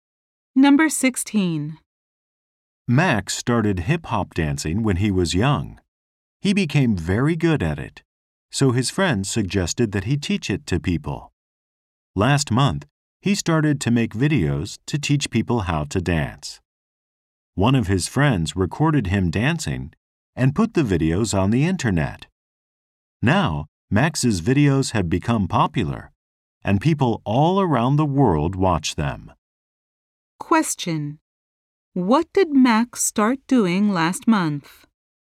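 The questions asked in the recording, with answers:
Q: what did Max start doing last month?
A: Making videos to teach people how to dance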